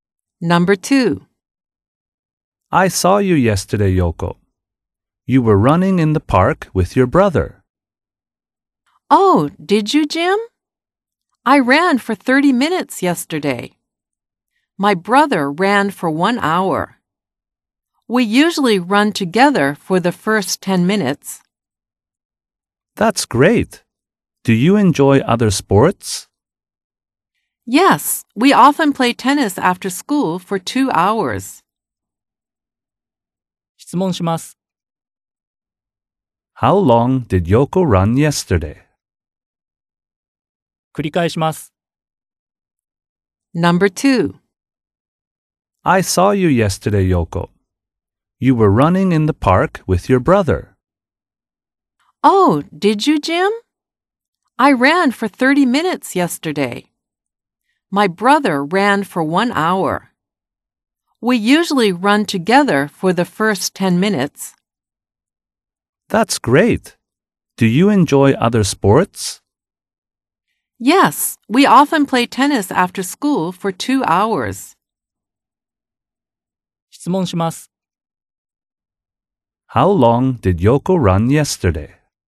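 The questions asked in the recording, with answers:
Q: How long did Yoko run yesterday?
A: For 30 minutes.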